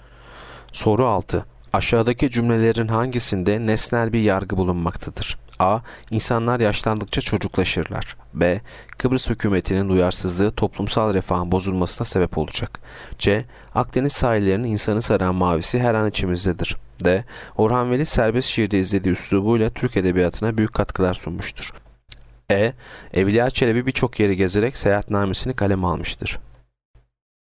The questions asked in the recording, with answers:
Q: Aşağıdaki cümlelerin hangisinde nesnel bir yargı bulunmaktadır?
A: Yanıt E. Evliya Çelebi birçok yeri gezerek seyahatnamesini kaleme almıştır.